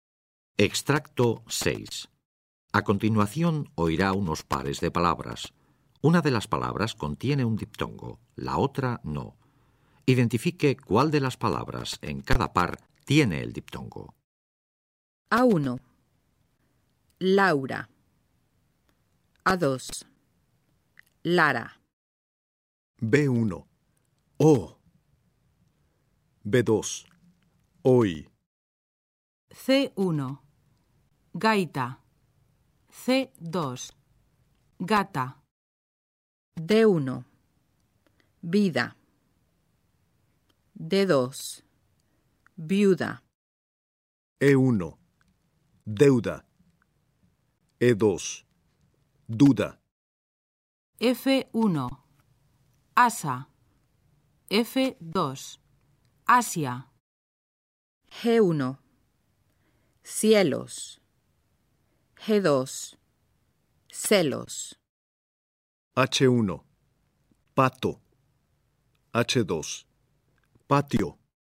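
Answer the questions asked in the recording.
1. 1: Laura
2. 2: Hoy
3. 1: Gaita
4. 2: Viuda
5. 1: Deuda
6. 2: Asia
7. 1: Cielos
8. 2: Patio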